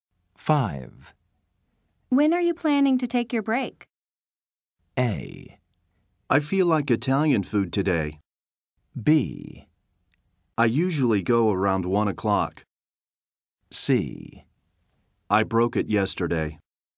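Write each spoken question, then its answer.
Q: When are you planning to take your break?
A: B: I usually go around 1 o'clock.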